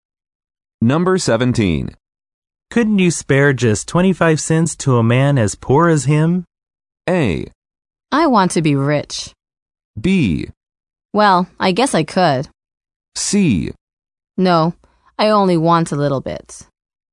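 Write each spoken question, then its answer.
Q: Couldn't you spare just 25 cents to a man as poor as him?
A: B: Well, I guess I could.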